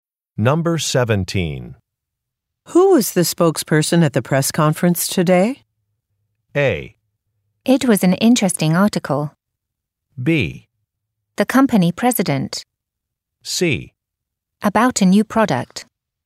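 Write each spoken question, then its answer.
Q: Who was the spokesperson at the press conference today?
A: B: The company president.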